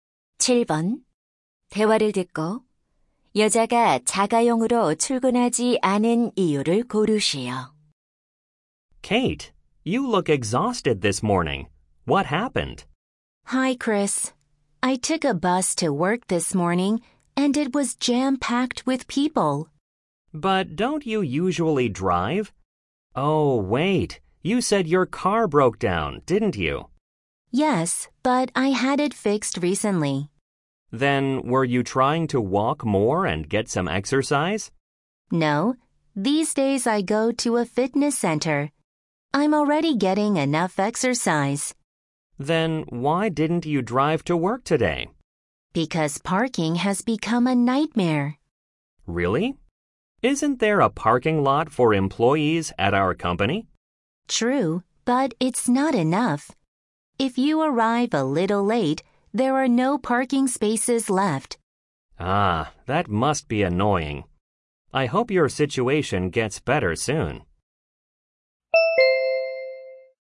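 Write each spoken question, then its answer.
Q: 대화를 듣고 여자가 자가용으로 출근하지 않은 이유를 고르시오.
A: 주차 공간이 부족해서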